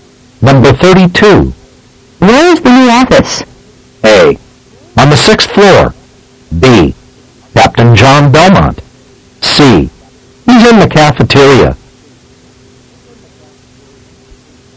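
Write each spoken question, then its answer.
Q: Where is the new office?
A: A: On the 6th floor.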